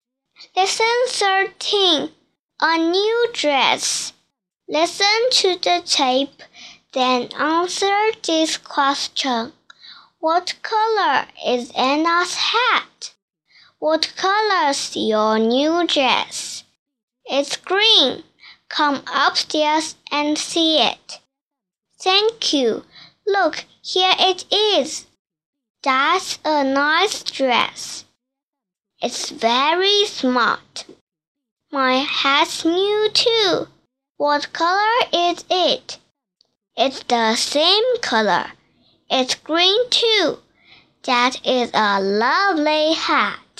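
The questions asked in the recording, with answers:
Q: What color is Anna's hat?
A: Green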